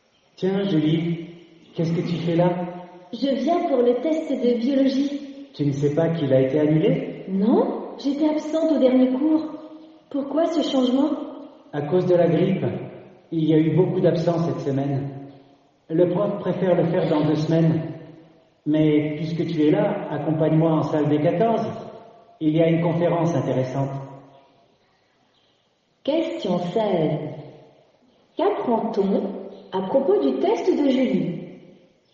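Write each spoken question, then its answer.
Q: Qu'apprend-on à propos du test de Julie ?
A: Il a été annulé et reporté à dans deux semaines à cause de la grippe.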